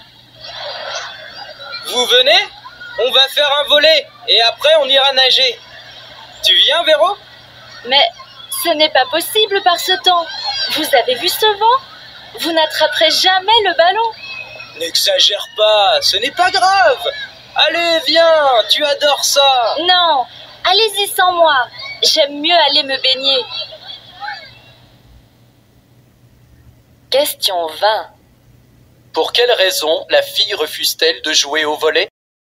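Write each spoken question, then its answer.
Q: Pour quelle raison la fille refuse-t-elle de jouer au volet?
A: À cause du vent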